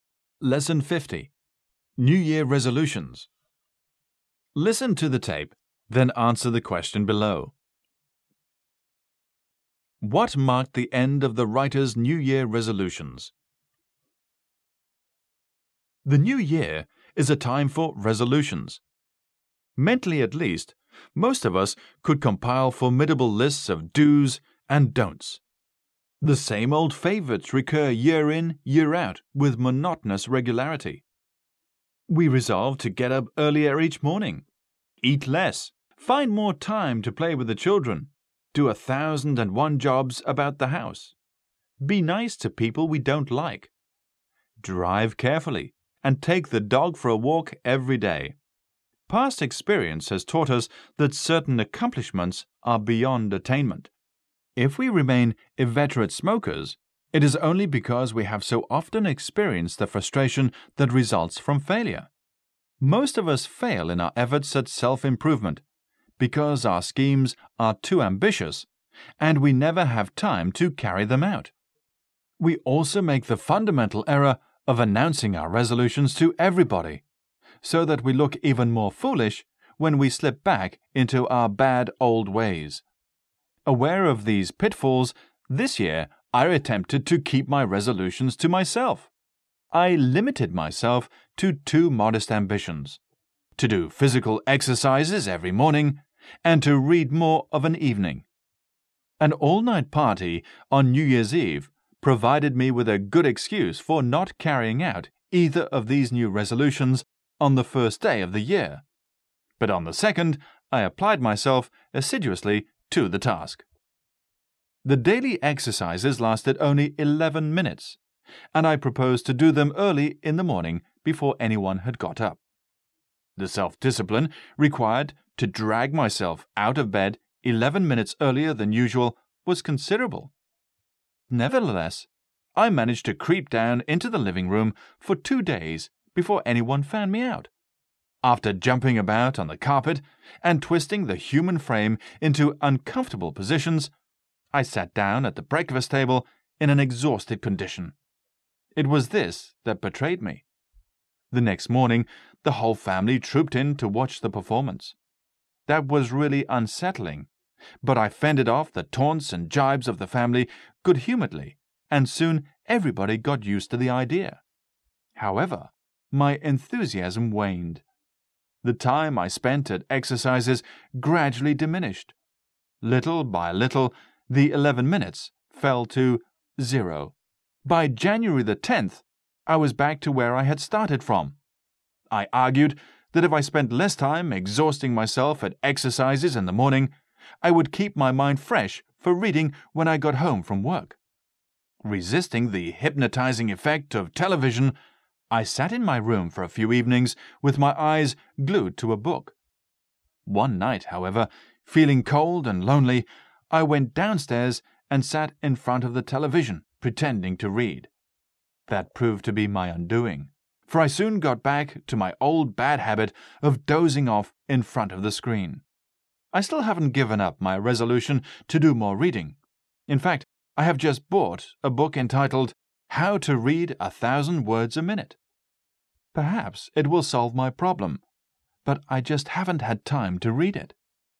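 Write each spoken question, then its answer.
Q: What marked the end of the writer's New Year resolutions?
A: He gave up exercising by January 10th and went back to dozing in front of the television instead of reading.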